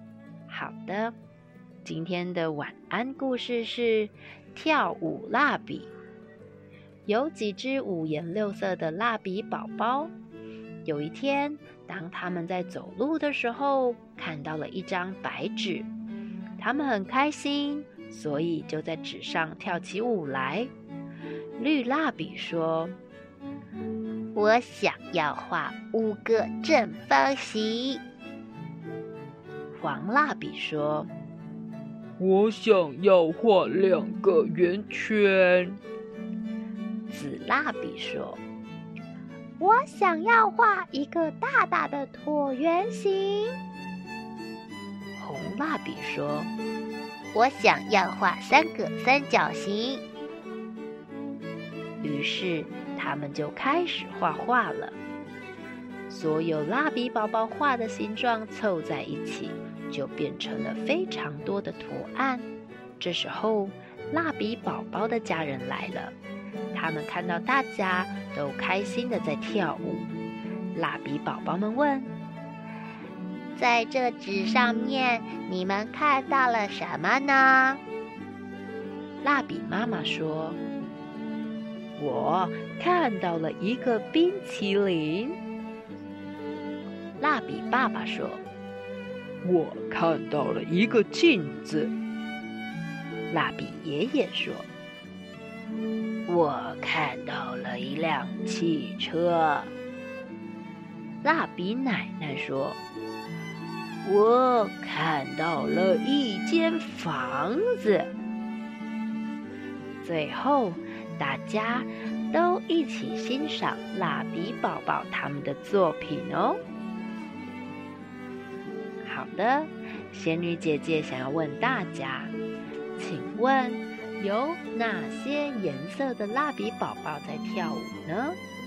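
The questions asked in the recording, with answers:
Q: 请问有哪些颜色的蜡笔宝宝在跳舞呢?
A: 绿色、黄色、紫色和红色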